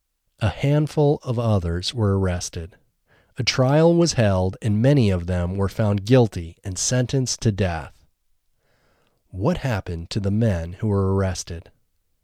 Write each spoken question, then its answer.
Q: what happened to the men who were arrested?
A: The men who were arrested were found guilty and sentenced to death.